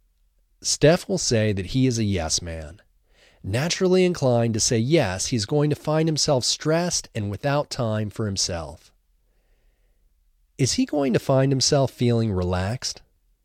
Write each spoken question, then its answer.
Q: Is he going to find himself feeling relaxed?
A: No, he's not going to find himself feeling relaxed.